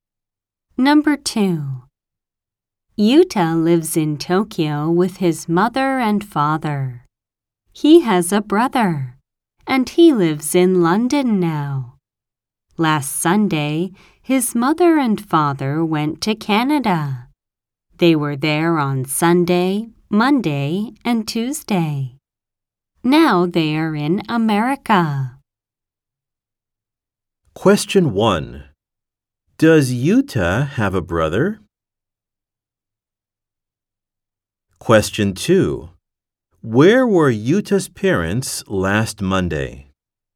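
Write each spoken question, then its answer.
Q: Does Yuta have a brother?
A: Yes, he does.

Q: Where were Yuta's parents last Monday?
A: In Canada.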